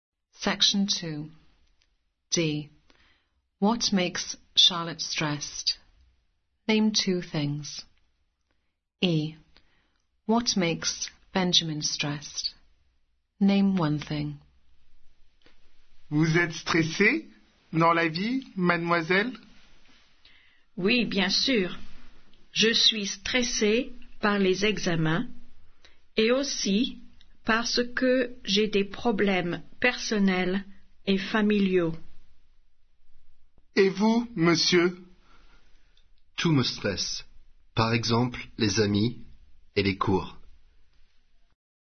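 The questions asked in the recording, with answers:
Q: What makes Charlotte stressed?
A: exams and personal/family problems

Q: What makes Benjamin stressed?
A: friends or lessons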